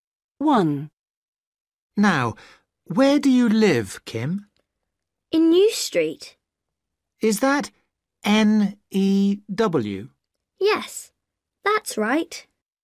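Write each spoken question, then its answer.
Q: Now, where do you live, Kim?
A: New Street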